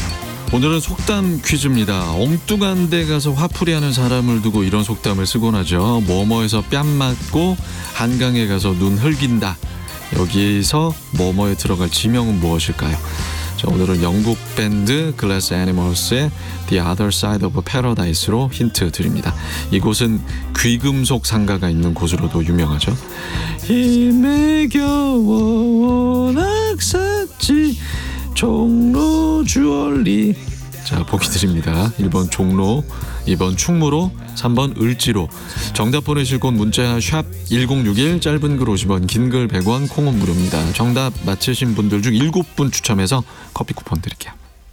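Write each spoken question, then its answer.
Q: 뭐뭐에서 뺨 맞고 한강에 가서 눈 흘긴다. 여기서 뭐뭐에 들어갈 지명은 무엇일까요?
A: 1: 종로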